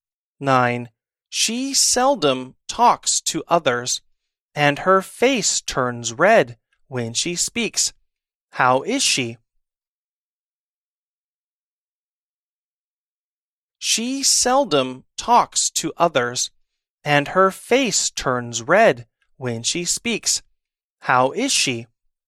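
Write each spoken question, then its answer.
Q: How is she?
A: She is shy.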